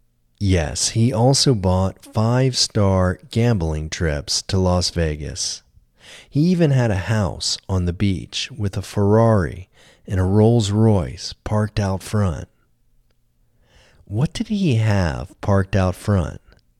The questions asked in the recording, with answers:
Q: What did he have parked out front?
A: He had a Ferrari and a Rolls Royce parked out front.